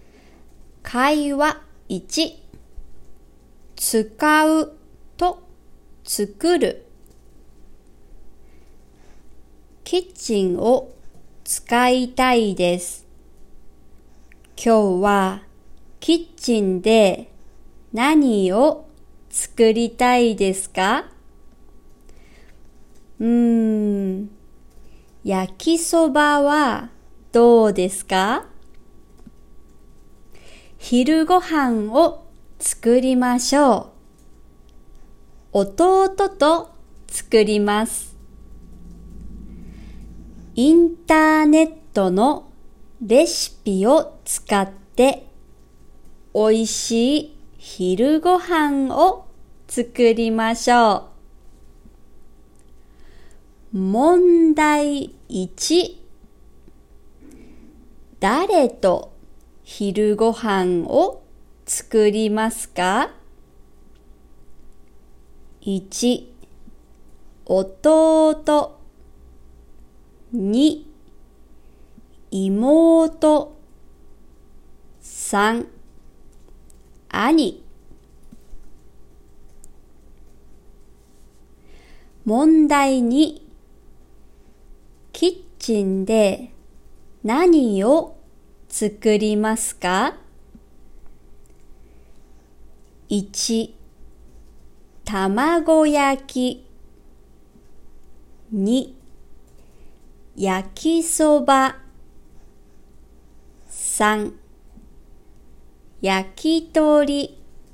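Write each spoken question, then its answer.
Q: 誰と昼ご飯を作りますか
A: 1: 弟

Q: キッチンで何を作りますか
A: 2: 焼きそば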